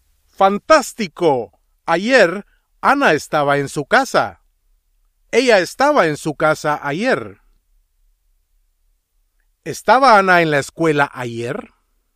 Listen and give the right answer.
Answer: No.